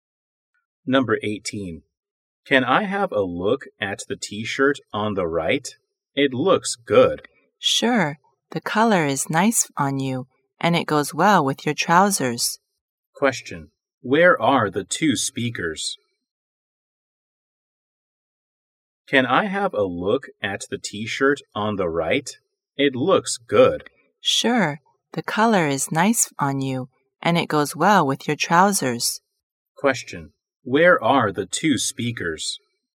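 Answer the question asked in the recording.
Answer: In a clothes store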